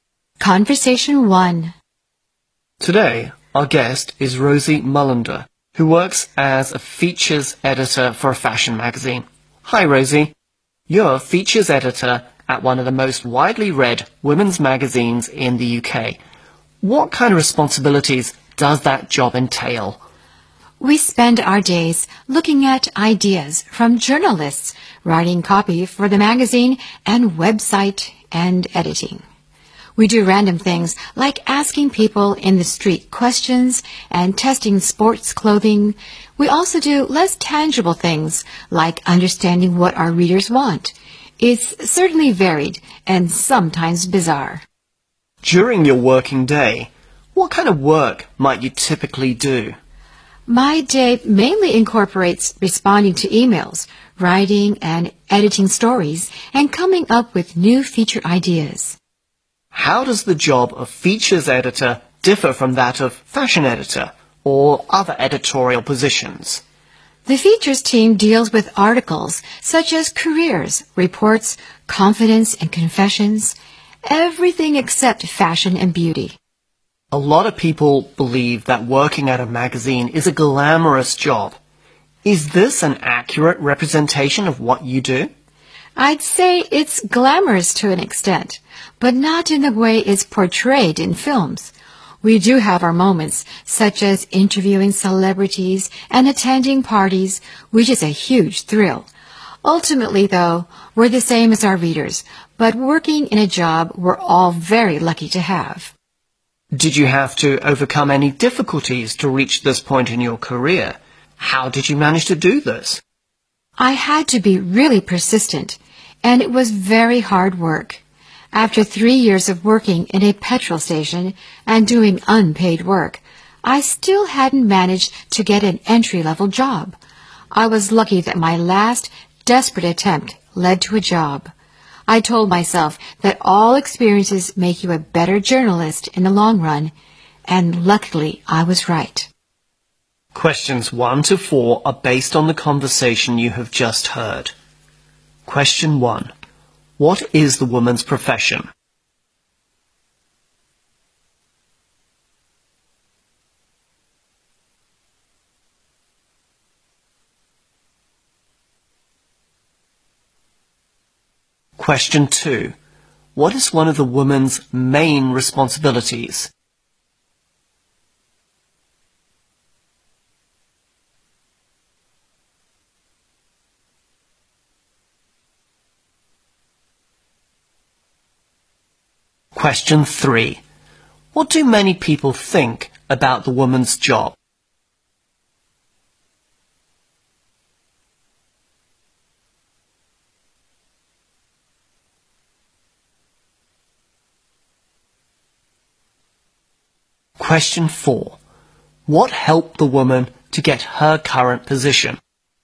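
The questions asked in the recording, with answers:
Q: What is the woman's profession?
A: Features editor at a fashion magazine

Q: What is one of the woman's main responsibilities?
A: Writing and editing stories and coming up with new feature ideas

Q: What do many people think about the woman's job?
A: It is glamorous

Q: What helped the woman to get her current position?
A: Her persistence and hard work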